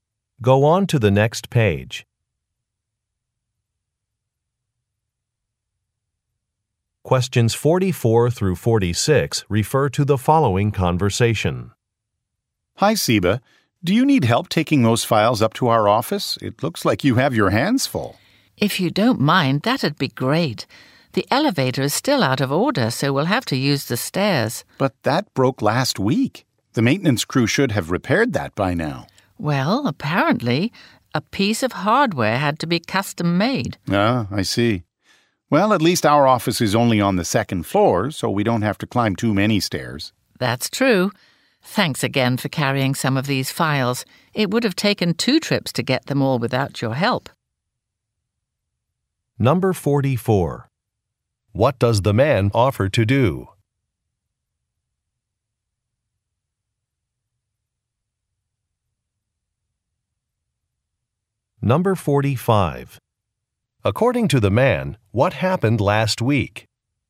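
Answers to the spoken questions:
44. Help carry files
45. The elevator broke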